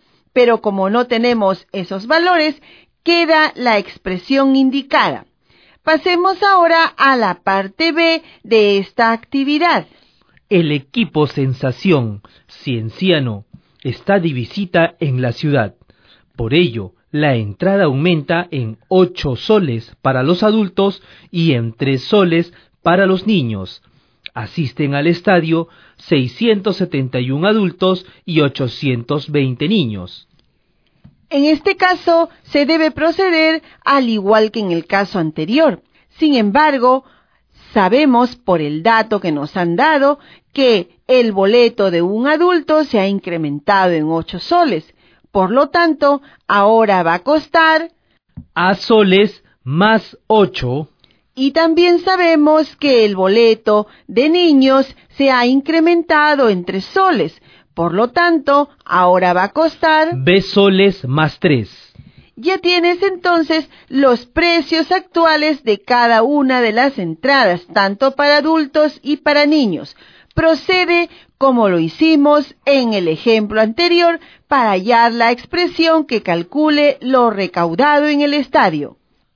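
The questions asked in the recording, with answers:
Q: Procede como lo hicimos en el ejemplo anterior para hallar la expresión que calcule lo recaudado en el estadio.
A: (a + 8)·671 + (b + 3)·820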